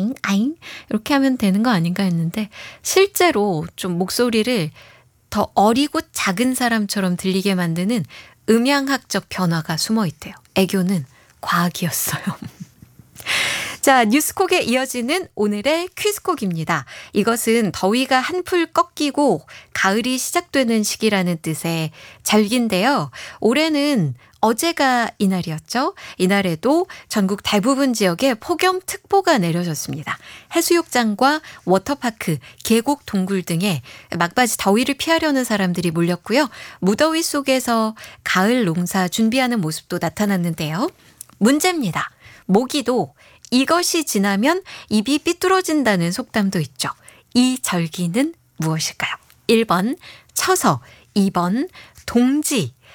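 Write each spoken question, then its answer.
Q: 이 절기는 무엇일까요? 1번 처서, 2번 동지.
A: 1: 처서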